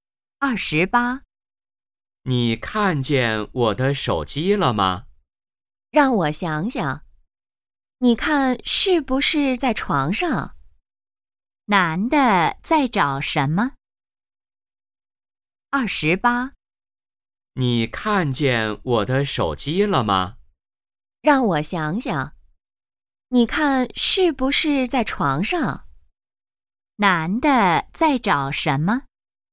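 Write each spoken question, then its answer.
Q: 男的在找什么?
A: 手机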